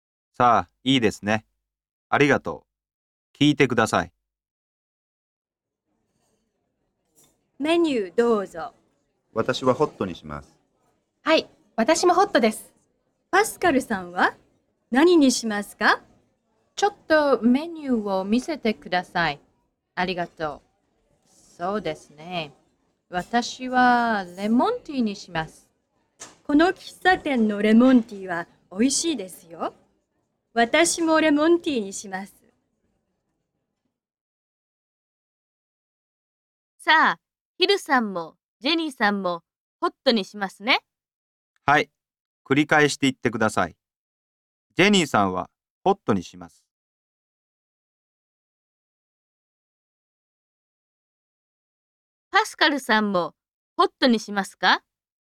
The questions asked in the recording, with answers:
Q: パスカルさんもホットにしますか?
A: いいえ、違います。ホットにしません。